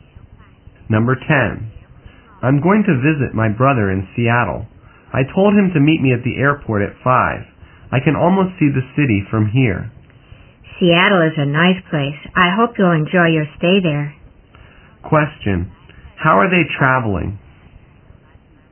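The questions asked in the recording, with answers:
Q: Question, how are they traveling?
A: By plane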